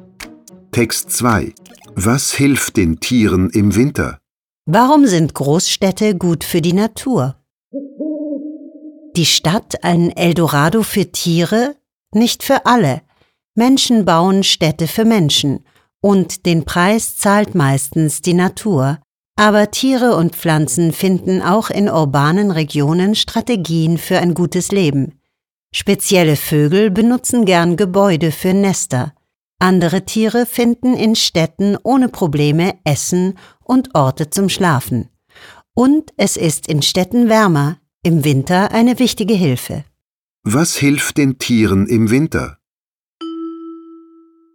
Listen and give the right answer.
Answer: In den Städten ist es wärmer.